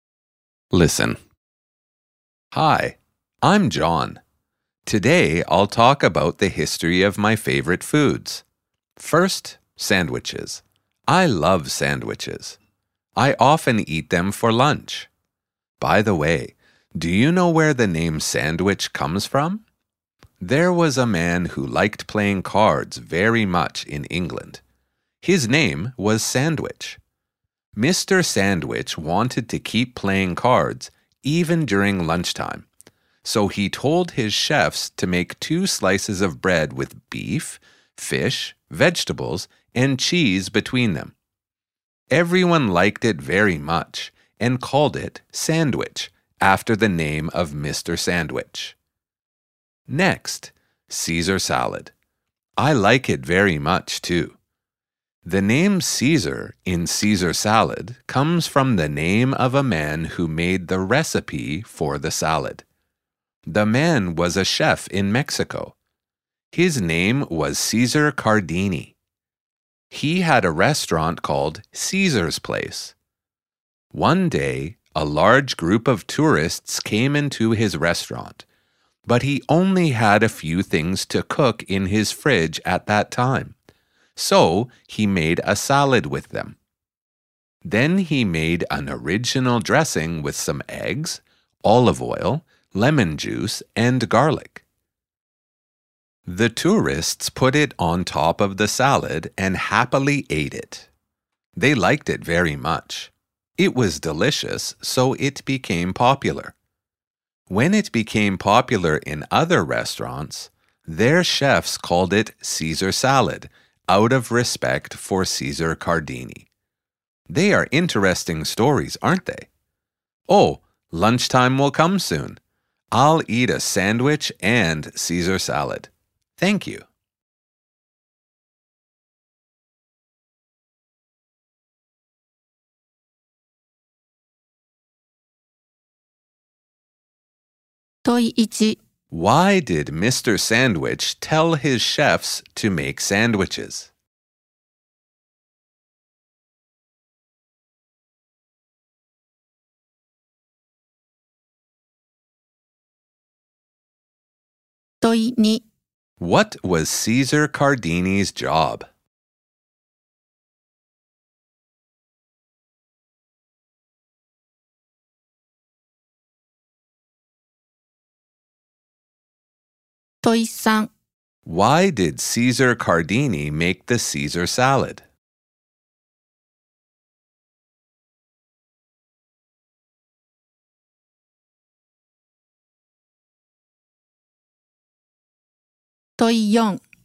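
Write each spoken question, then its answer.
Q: Why did Mr. Sandwich tell his chefs to make sandwiches?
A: He wanted to keep playing cards even during lunchtime

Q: What was Cesar Cardini's job?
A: A chef in Mexico

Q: Why did Cesar Cardini make the Caesar salad?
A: A large group of tourists came, and he only had a few things in his fridge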